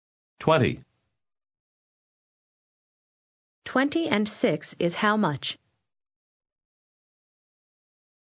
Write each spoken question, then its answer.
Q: 20 and 6 is how much?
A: 26.